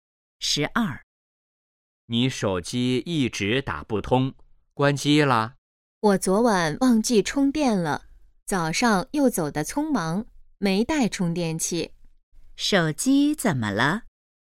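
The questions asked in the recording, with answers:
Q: 手机怎么了?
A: 没电了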